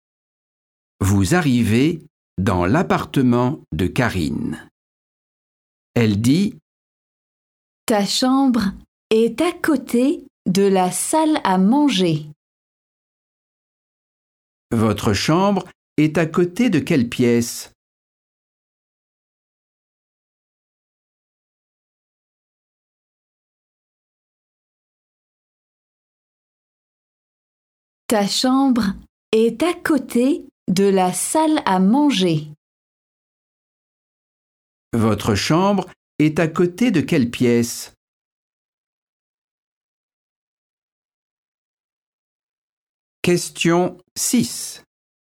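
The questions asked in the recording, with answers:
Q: Votre chambre est à côté de quelle pièce?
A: la salle à manger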